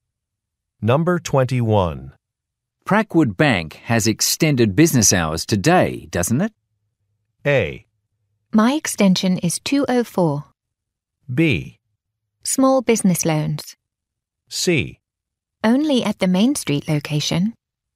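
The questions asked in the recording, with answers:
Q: Prackwood Bank has extended business hours today, doesn't it?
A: C: Only at the Main Street location.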